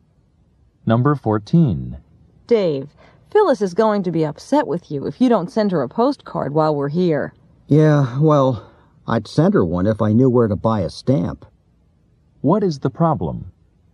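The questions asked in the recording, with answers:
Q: What is the problem?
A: Dave doesn't know where to buy a stamp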